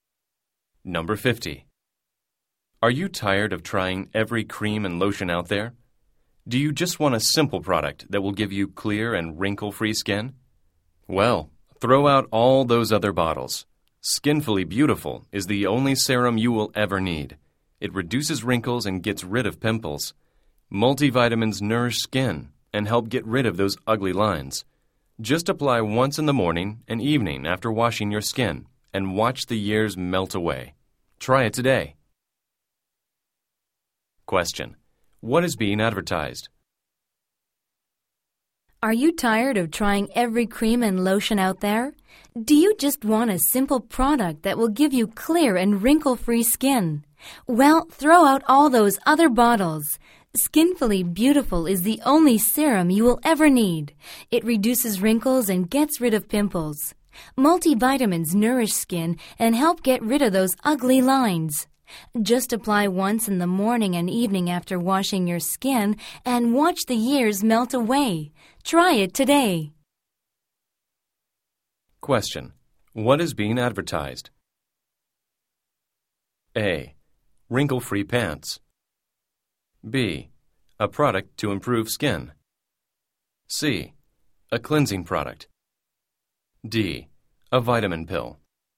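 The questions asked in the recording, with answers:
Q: What is being advertised?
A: B: A product to improve skin.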